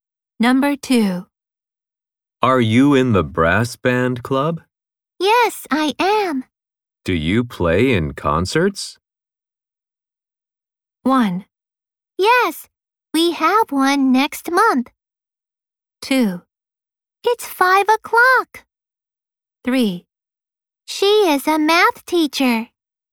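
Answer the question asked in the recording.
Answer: 1: Yes, we have one next month.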